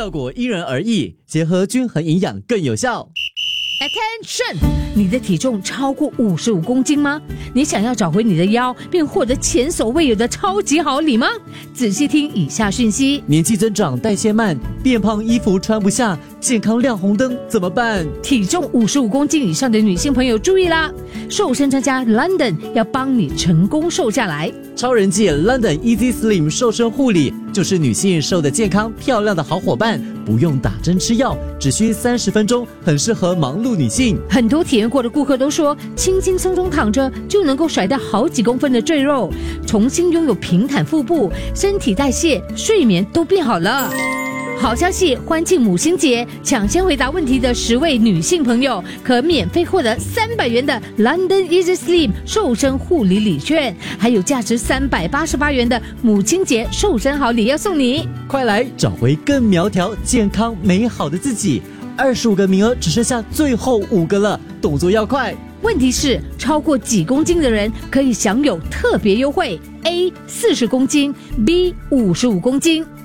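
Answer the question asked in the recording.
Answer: B: 55公斤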